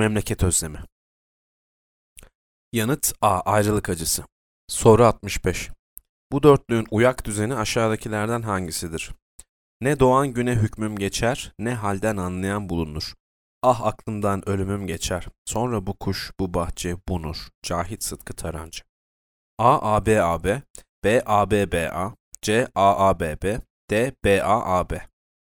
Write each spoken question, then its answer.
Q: Bu dörtlüğün uyak düzeni aşağıdakilerden hangisidir?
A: A-A-B-A-B.